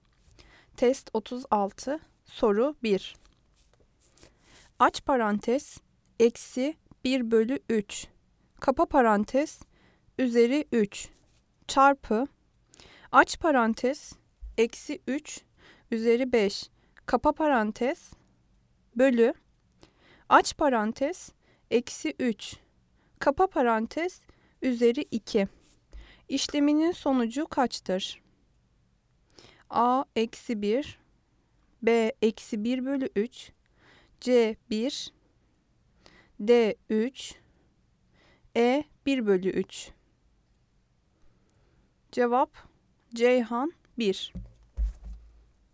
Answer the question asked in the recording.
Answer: Cevap, Ceyhan, 1.